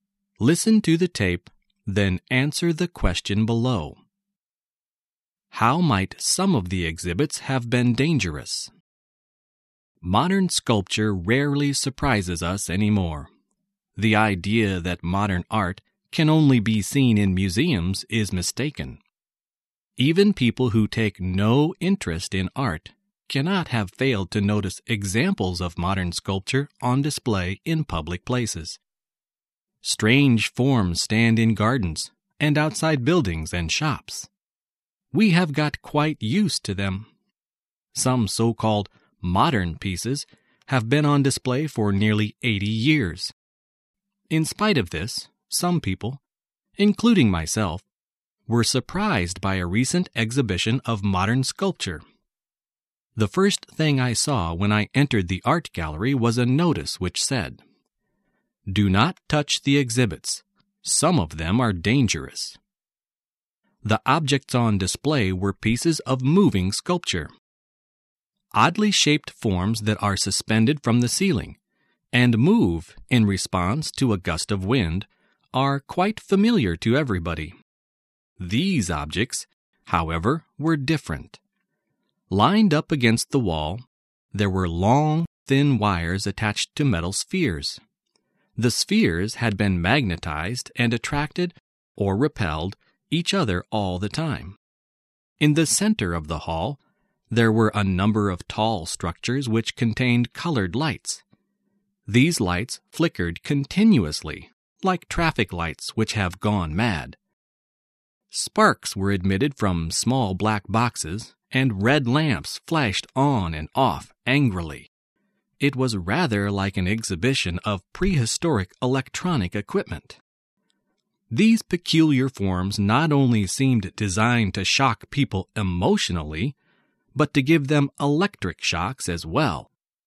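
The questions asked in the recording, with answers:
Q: How might some of the exhibits have been dangerous?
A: They could give people electric shocks.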